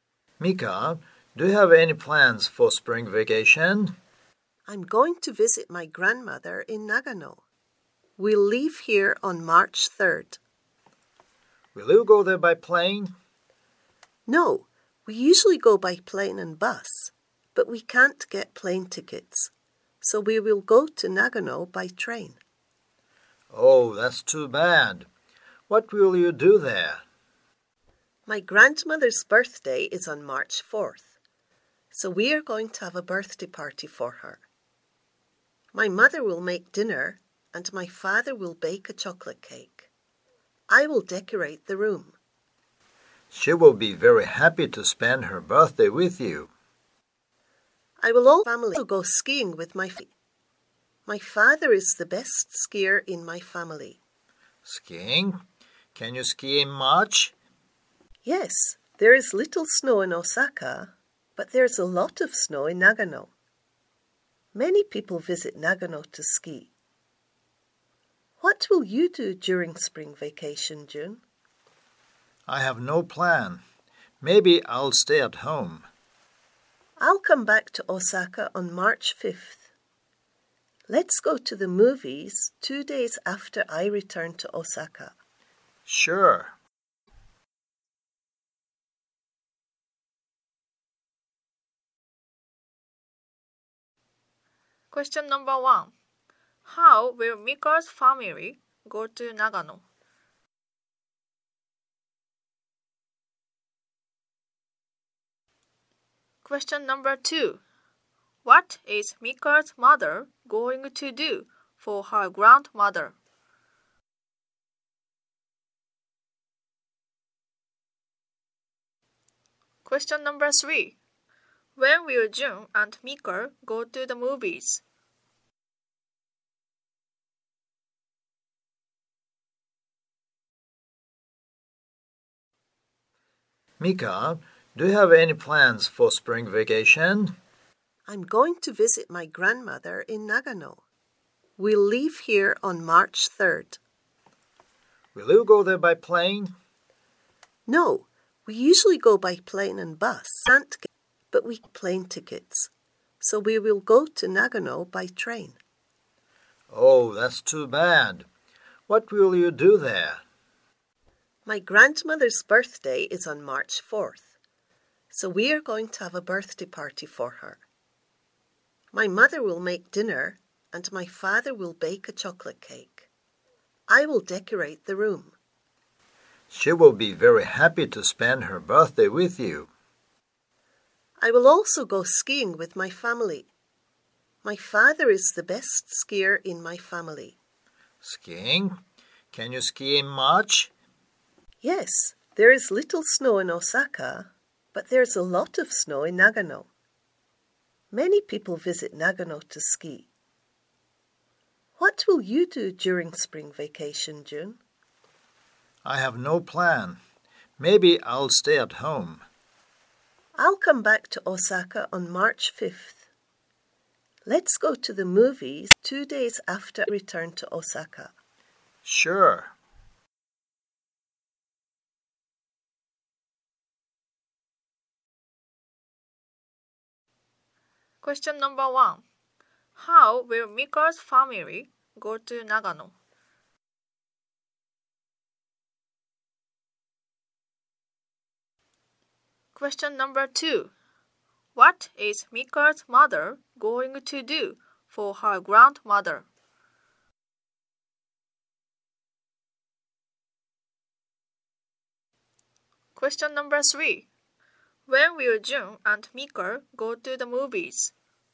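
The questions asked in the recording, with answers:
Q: How will Mika's family go to Nagano?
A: By train

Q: What is Mika's mother going to do for her grandmother?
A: Make dinner

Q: When will June and Mika go to the movies?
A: On March 7th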